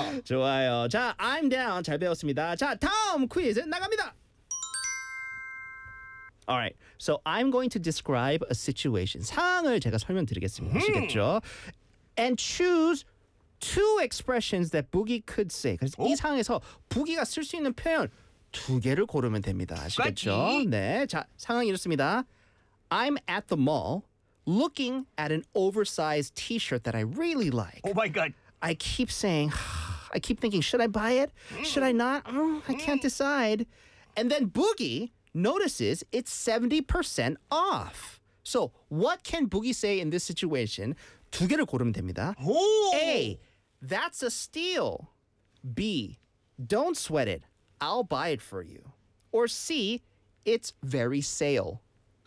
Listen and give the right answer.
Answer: 그래서 부기가 이 상황에서 할 수 있는 말 두 가지가 A.